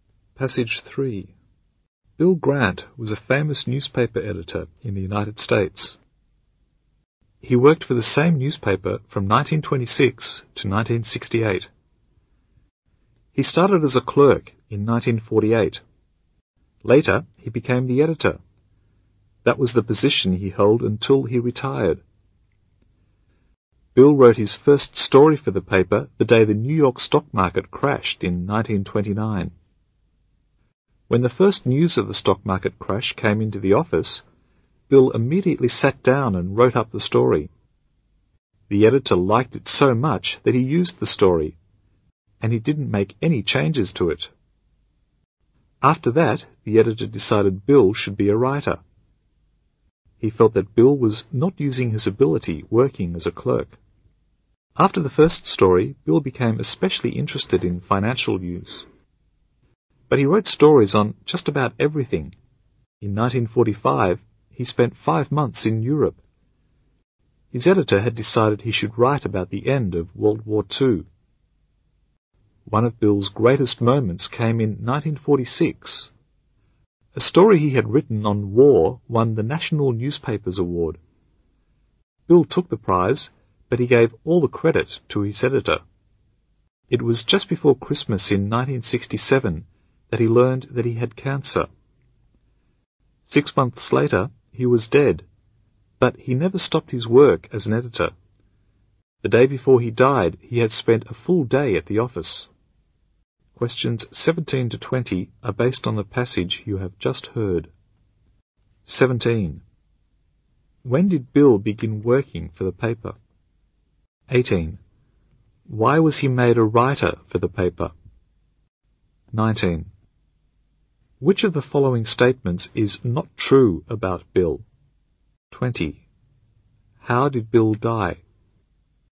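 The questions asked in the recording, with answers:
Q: Why was he made a writer for the paper?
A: The editor liked his story on the 1929 stock market crash.

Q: How did Bill die?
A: Of cancer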